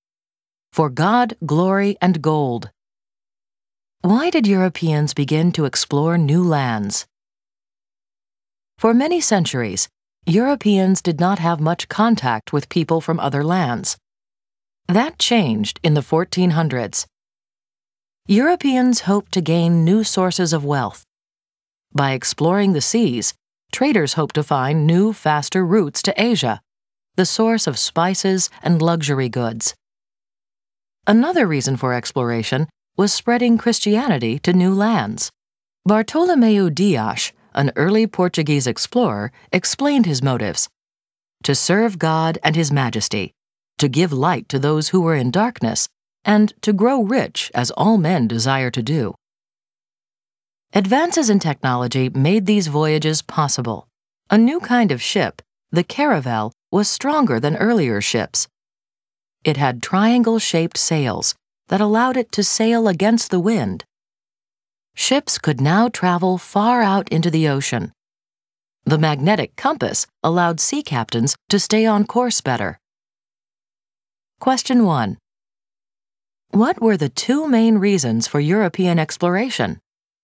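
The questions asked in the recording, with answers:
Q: What were the two main reasons for European exploration?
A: To gain new sources of wealth and to spread Christianity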